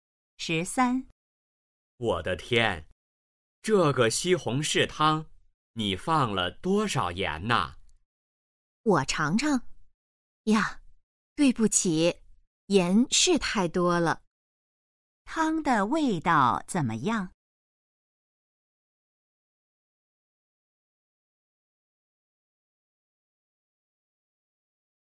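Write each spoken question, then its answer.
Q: 汤的味道怎么样?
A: 太咸了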